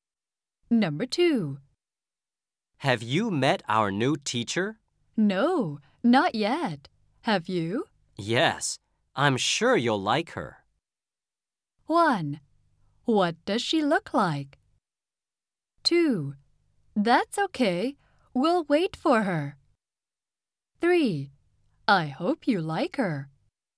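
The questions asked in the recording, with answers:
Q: Yes, I'm sure you'll like her.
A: 1: What does she look like?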